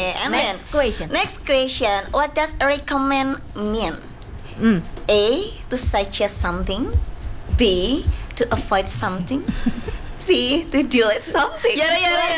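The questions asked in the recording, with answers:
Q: What does recommend mean?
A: A: To suggest something.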